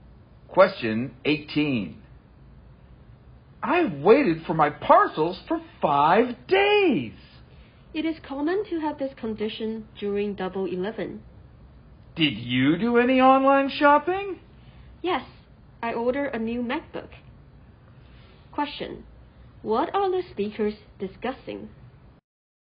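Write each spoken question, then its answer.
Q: What are the speakers discussing?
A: Online shopping and slow parcel delivery during Double 11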